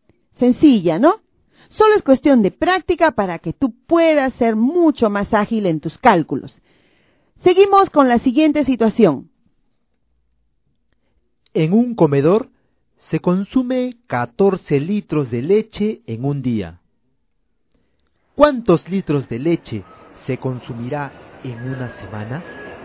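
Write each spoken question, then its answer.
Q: ¿Cuántos litros de leche se consumirá en una semana?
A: 98 litros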